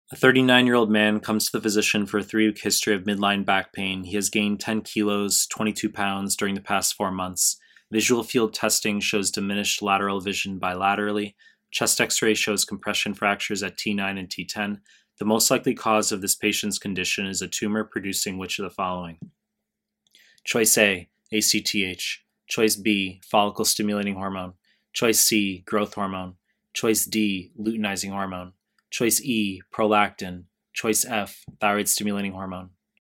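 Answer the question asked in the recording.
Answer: A: ACTH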